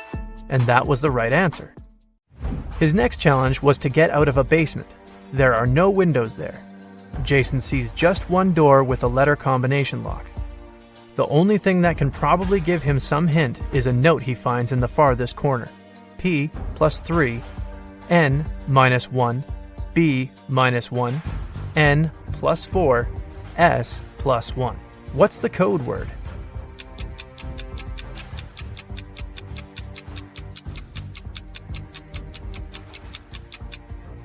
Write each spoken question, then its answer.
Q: What's the code word?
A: The code word was SMART.